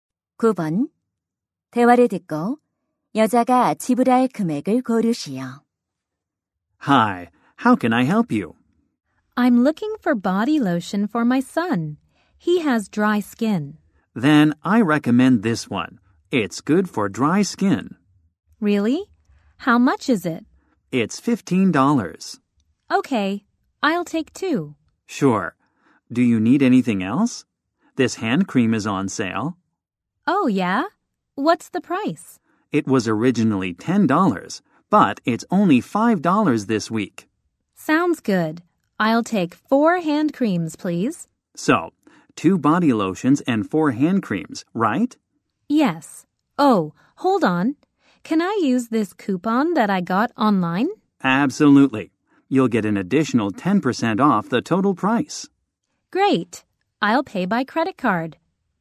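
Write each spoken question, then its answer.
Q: 대화를 듣고 여자가 지불할 금액을 고르시오.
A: $45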